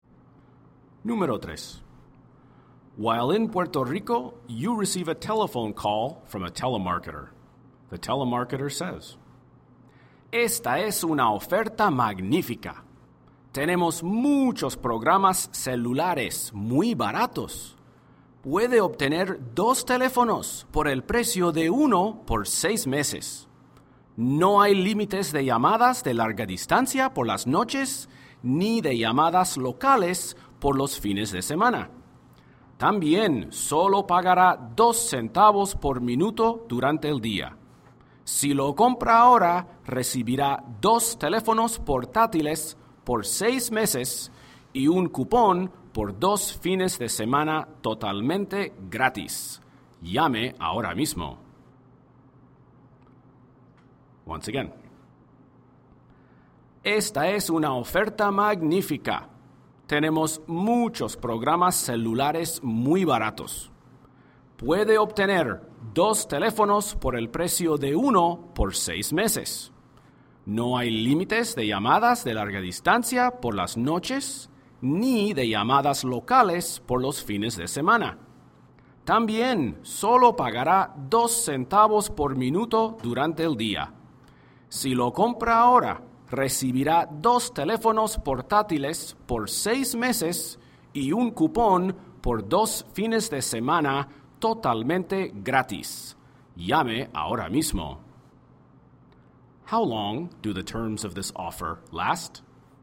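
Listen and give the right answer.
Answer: 6 months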